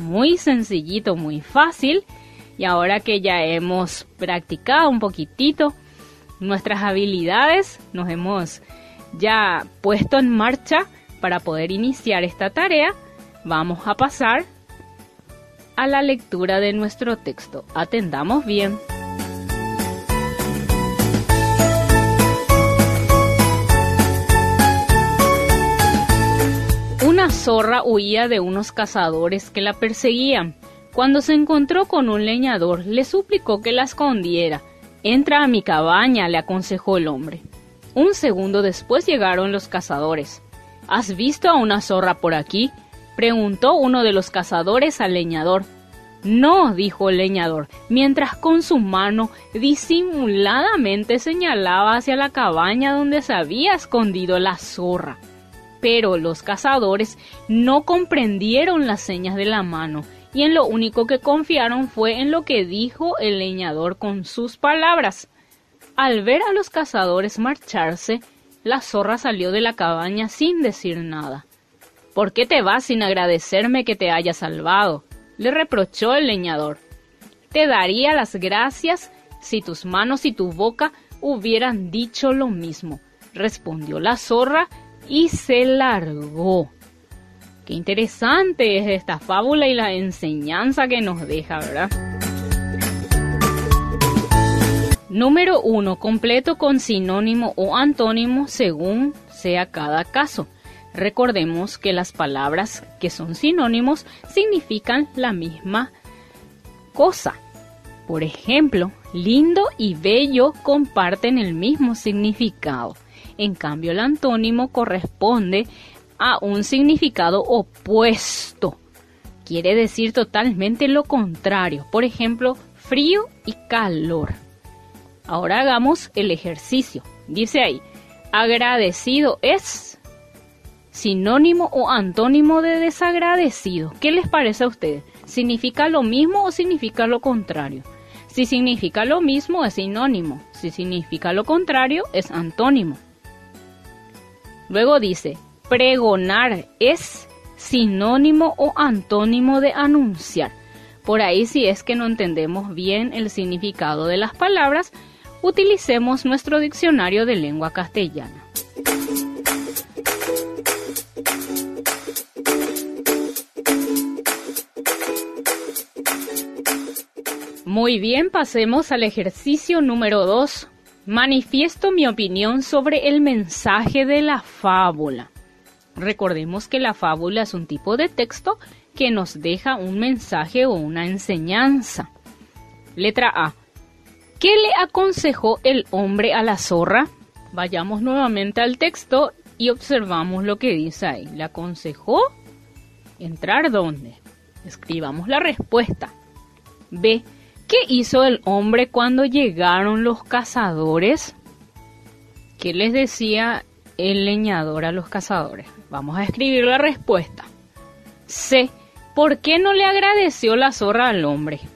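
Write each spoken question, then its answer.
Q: ¿Qué le aconsejó el hombre a la zorra?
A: Que entrara a su cabaña

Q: ¿Qué hizo el hombre cuando llegaron los cazadores?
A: Les dijo que no había visto a la zorra, pero con la mano señalaba la cabaña donde estaba escondida

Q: ¿Por qué no le agradeció la zorra al hombre?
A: Porque sus manos y su boca no dijeron lo mismo: con palabras la protegió, pero con la mano la delató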